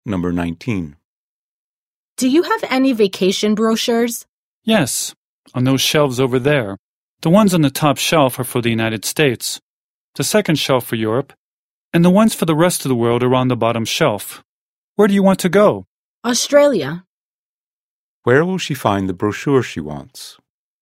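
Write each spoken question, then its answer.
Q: Where will she find the brochure she wants?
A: On the bottom shelf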